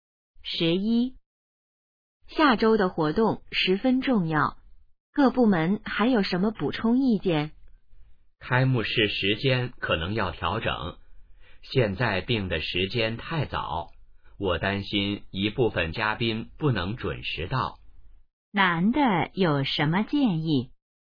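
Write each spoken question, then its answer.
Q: 男的有什么建议?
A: 调整开幕式时间(推迟)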